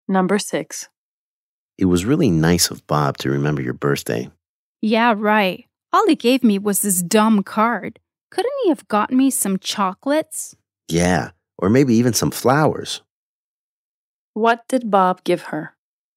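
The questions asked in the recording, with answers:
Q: What did Bob give her?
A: A card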